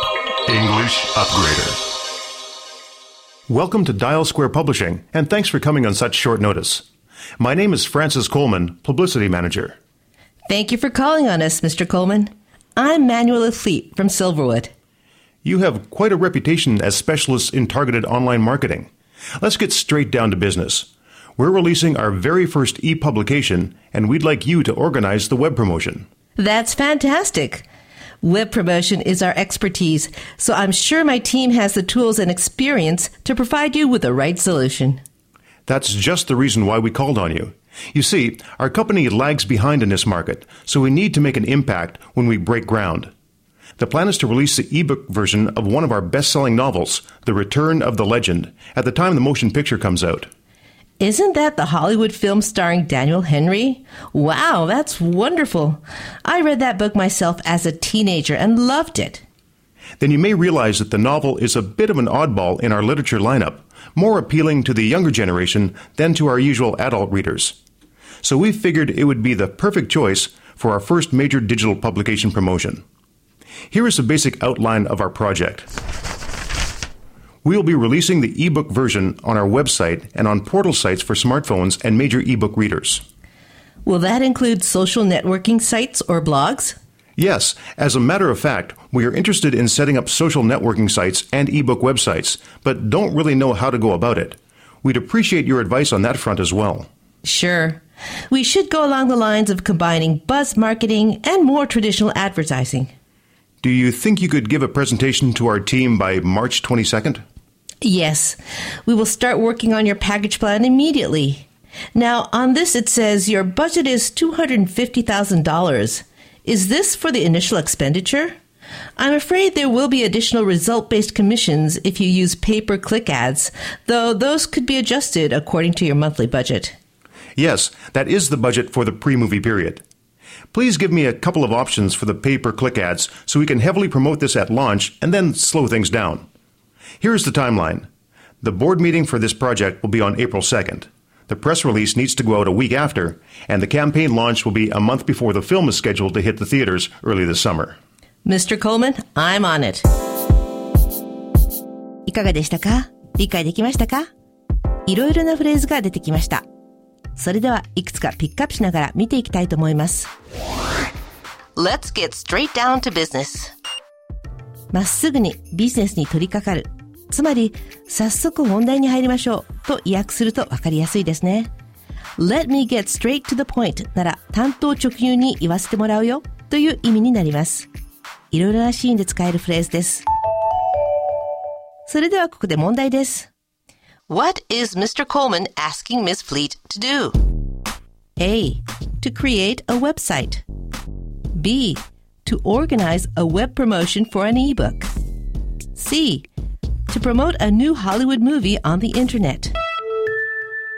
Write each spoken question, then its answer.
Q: What is Mr. Coleman asking Ms. Fleet to do?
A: 正解は B です